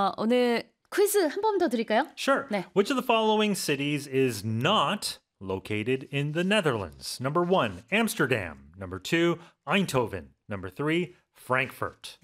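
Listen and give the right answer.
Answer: 3: Frankfurt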